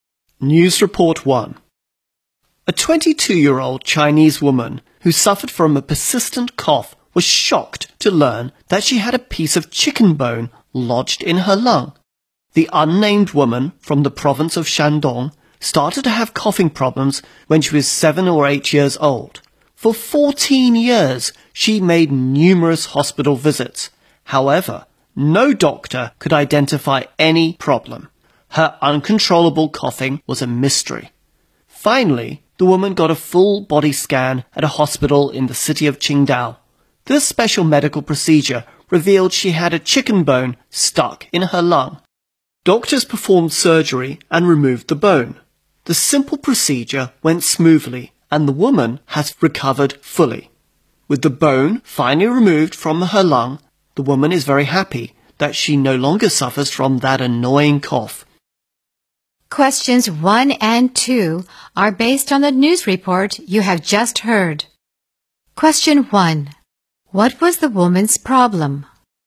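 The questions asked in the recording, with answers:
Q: What was the woman's problem?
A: A chicken bone was stuck in her lung, causing a persistent cough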